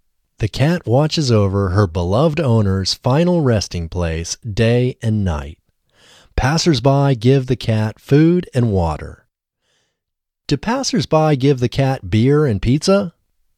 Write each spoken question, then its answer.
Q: Do passersby give the cat beer and pizza?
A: No, passersby don't give the cat beer and pizza.